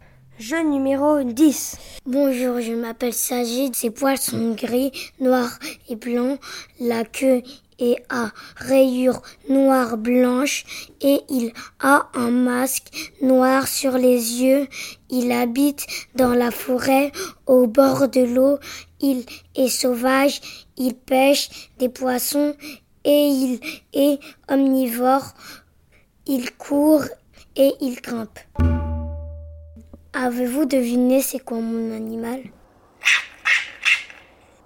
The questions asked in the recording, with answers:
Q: Avez-vous deviné c'est quoi mon animal ?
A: Mon animal préféré, c'est le raton laveur.